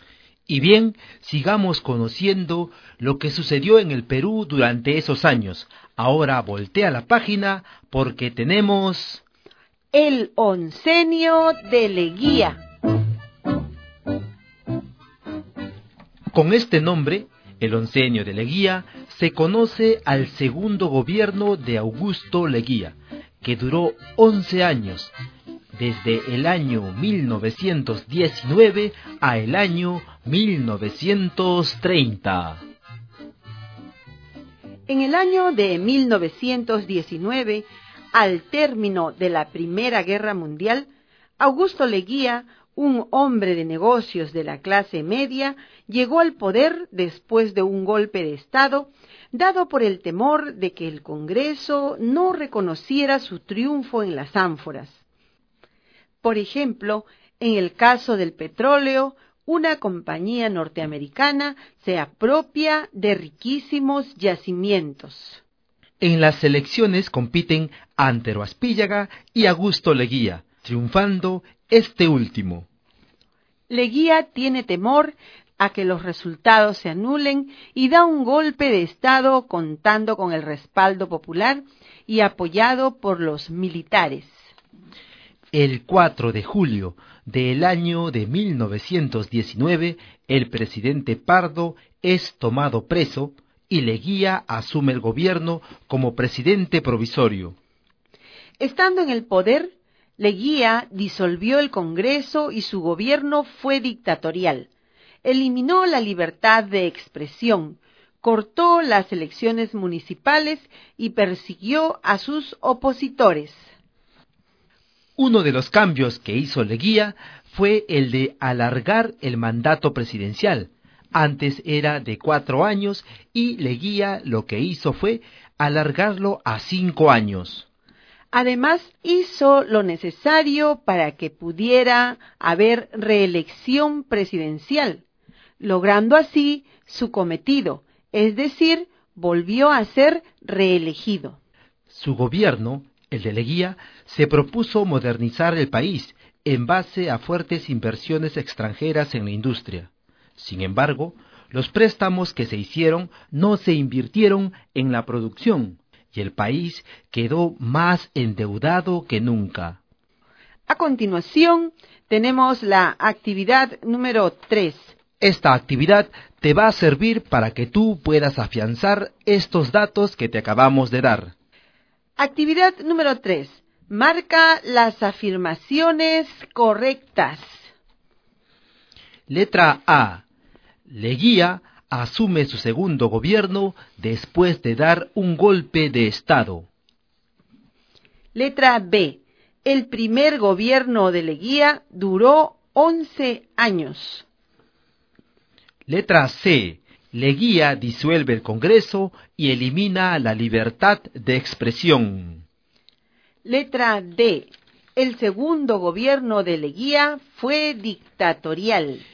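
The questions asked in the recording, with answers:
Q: Letra A. Leguía asume su segundo gobierno después de dar un golpe de Estado.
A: Correcta

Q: Letra B. El primer gobierno de Leguía duró 11 años.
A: Incorrecta

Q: Letra C. Leguía disuelve el Congreso y elimina la libertad de expresión.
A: Correcta

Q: Letra D. El segundo gobierno de Leguía fue dictatorial.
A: Correcta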